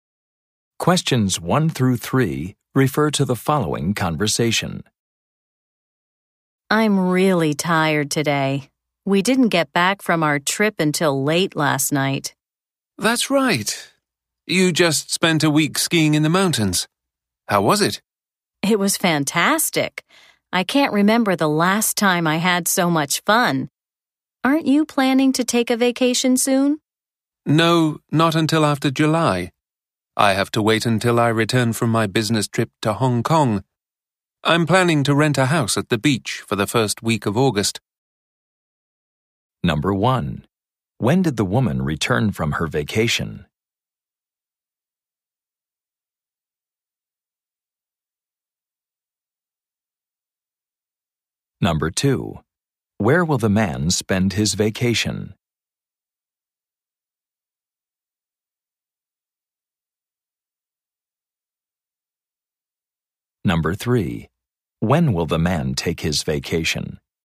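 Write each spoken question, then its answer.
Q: When did the woman return from her vacation?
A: Late last night

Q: Where will the man spend his vacation?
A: At a beach house

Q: When will the man take his vacation?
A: The first week of August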